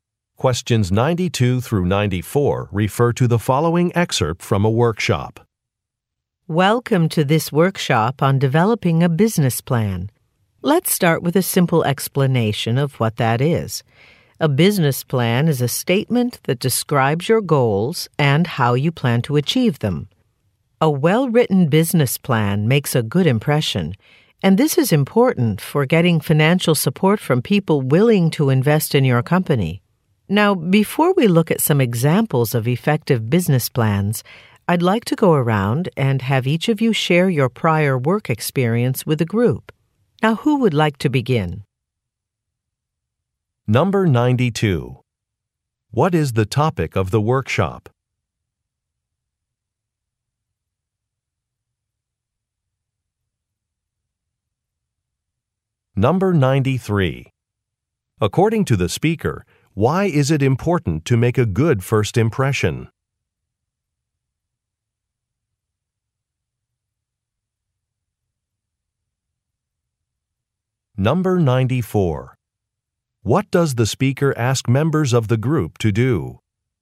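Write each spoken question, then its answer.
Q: What is the topic of the workshop?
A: Developing a business plan

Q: According to the speaker, why is it important to make a good first impression?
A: To get financial support from investors

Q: What does the speaker ask members of the group to do?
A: Share their prior work experience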